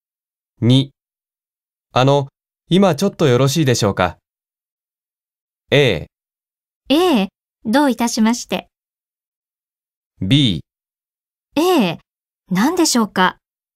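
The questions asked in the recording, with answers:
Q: 今ちょっとよろしいでしょうか?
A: B: 何でしょうか。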